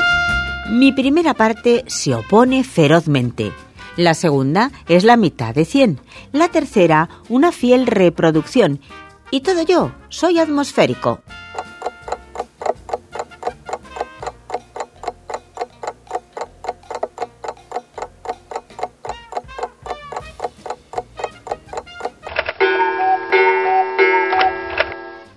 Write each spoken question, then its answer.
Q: Y todo yo, soy atmosférico.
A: Solución, el anticiclón. Anti-ci-clón.